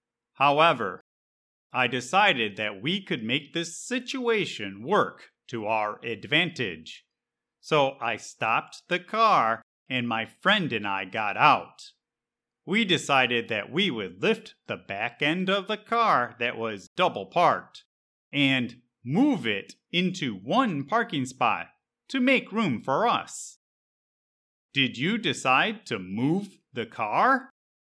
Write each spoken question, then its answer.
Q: Did you decide to move the car?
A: Yep, my friend and I decided that we would move the car so that it was only in one parking space.